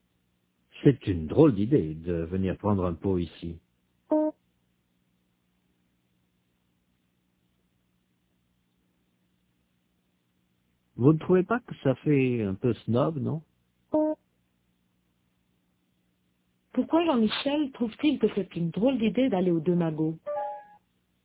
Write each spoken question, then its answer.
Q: Pourquoi Jean-Michel trouve-t-il que c'est une drôle d'idée d'aller aux deux magots?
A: Parce que ça fait un peu snob?